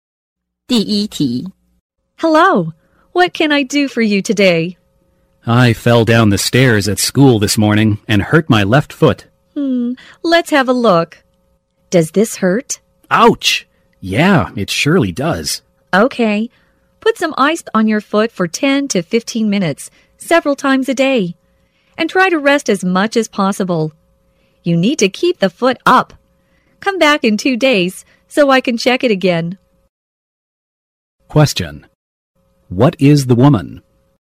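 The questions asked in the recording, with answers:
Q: What is the woman?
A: A doctor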